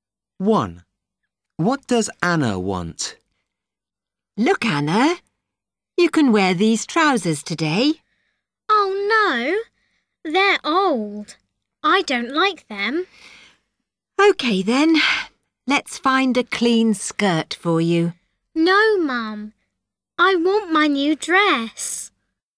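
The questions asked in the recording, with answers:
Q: What does Anna want?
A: her new dress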